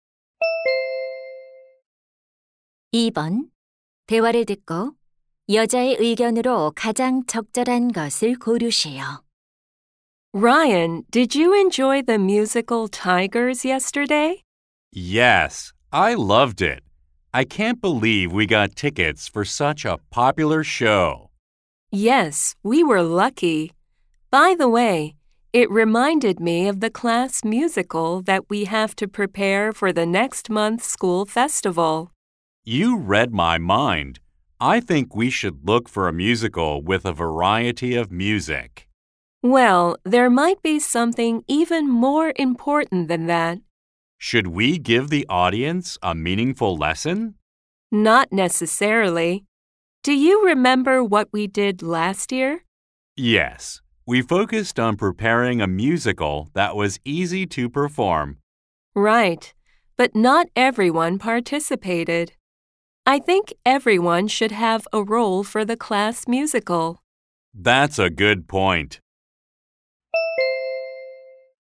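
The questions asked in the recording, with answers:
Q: 대화를 듣고 여자의 의견으로 가장 적절한 것을 고르세요.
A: 학급 뮤지컬에서는 모든 학생이 역할을 맡아야 한다.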